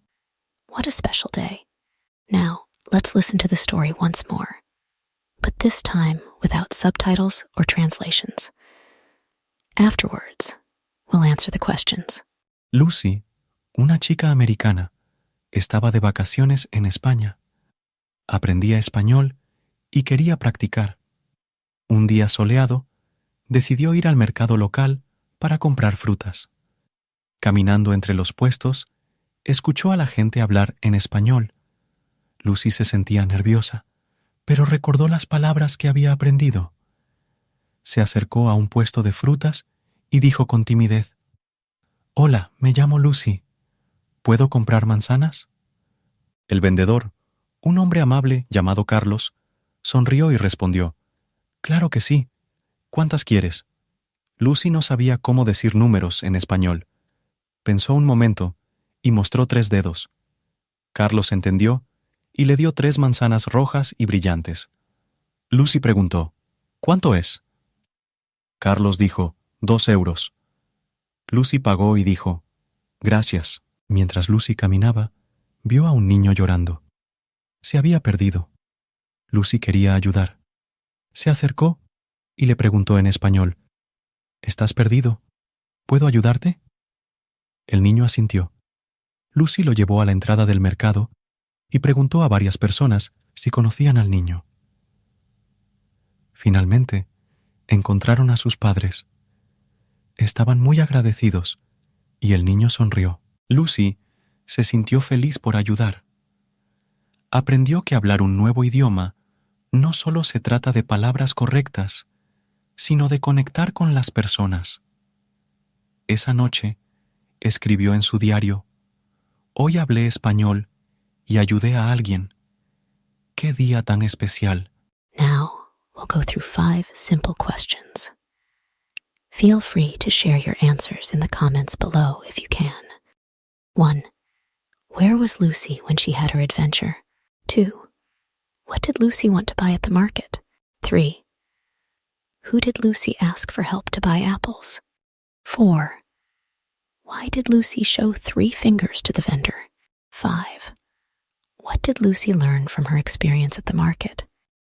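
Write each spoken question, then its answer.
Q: Where was Lucy when she had her adventure?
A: At a local market in Spain

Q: What did Lucy want to buy at the market?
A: Fruit (apples)

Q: Who did Lucy ask for help to buy apples?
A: Carlos, the fruit vendor

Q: Why did Lucy show 3 fingers to the vendor?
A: She didn't know how to say numbers in Spanish

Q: What did Lucy learn from her experience at the market?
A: Speaking a new language is not just about correct words but about connecting with people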